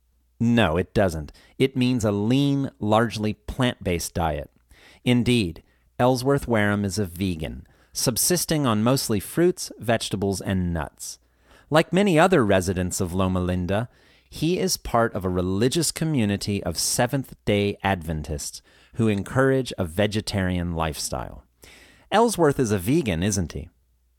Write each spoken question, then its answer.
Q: Ellsworth is a vegan, isn't he?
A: Yes, he's a vegan.